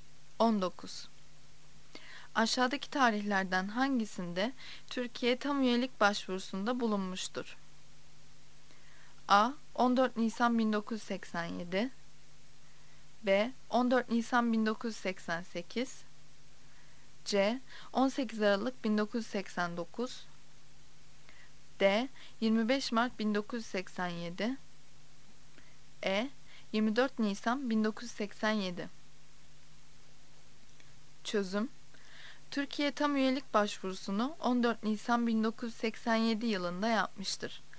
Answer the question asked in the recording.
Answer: Yanıt A'dır. A. 14 Nisan 1987.